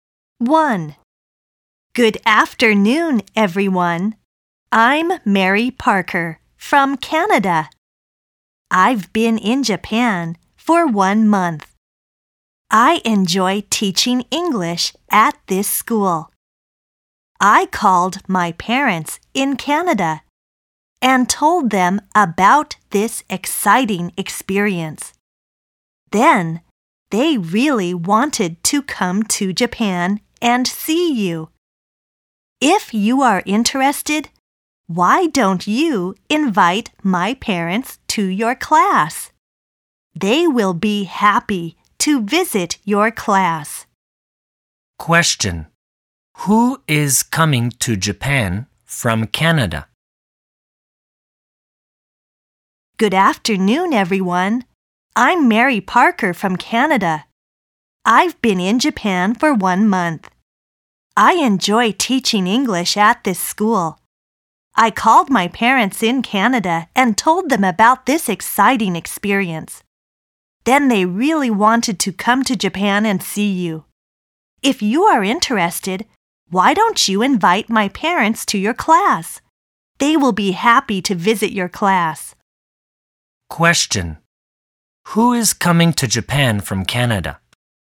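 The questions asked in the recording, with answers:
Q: Who is coming to Japan from Canada?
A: Mary Parker's parents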